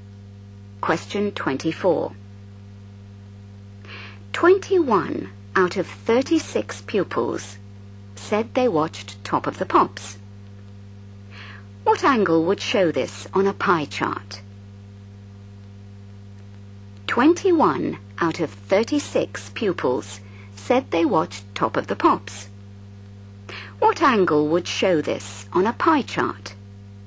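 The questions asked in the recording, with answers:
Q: What angle would show this on a pie chart?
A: 210 degrees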